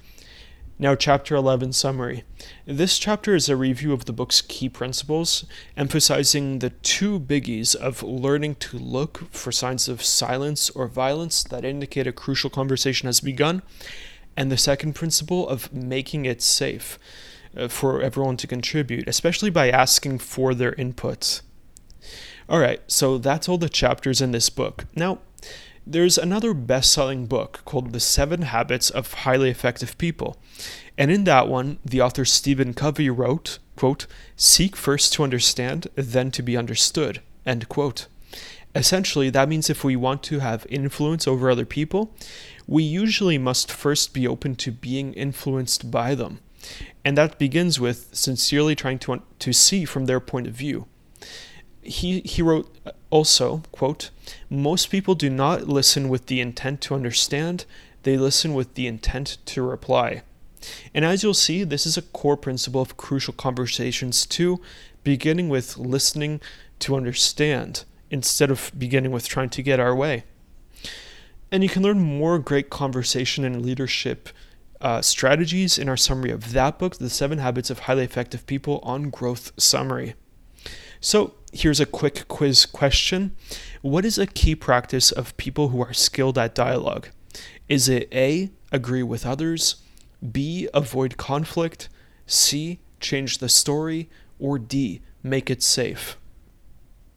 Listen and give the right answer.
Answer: And the correct answer is D, make it safe.